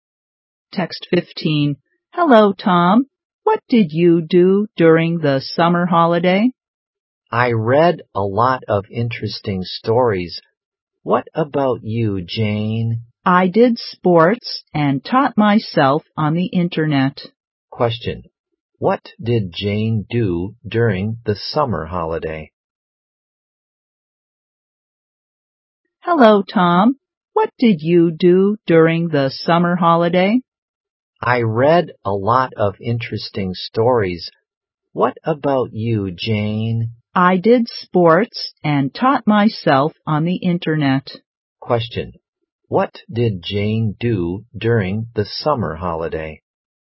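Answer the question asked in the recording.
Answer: She did sports and taught herself on the internet.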